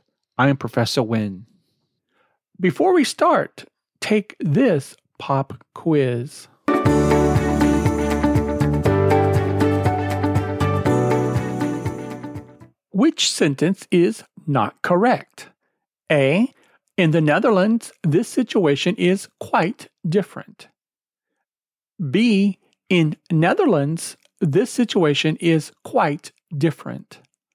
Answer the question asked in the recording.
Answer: Well, B is not correct.